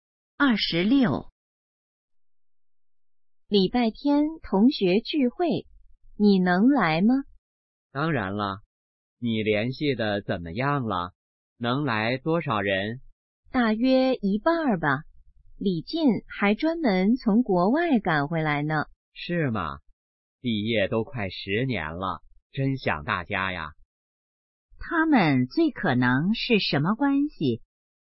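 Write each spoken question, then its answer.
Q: 他们最可能是什么关系?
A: 同学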